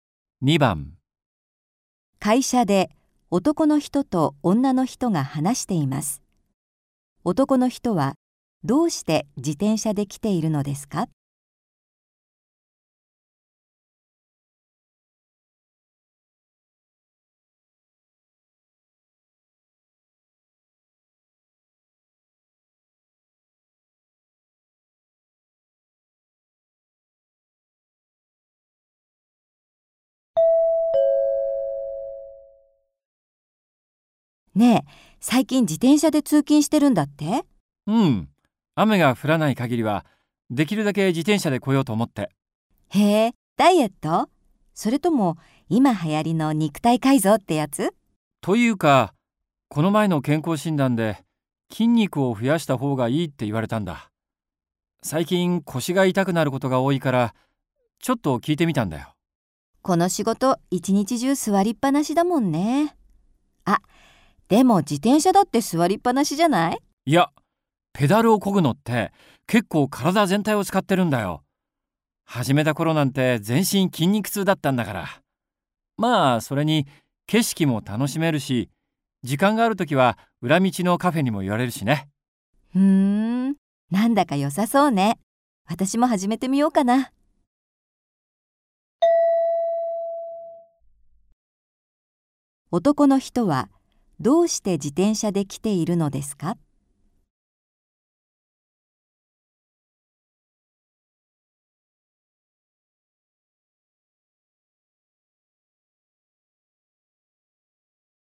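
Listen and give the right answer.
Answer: 健康診断で筋肉を増やした方がいいと言われたから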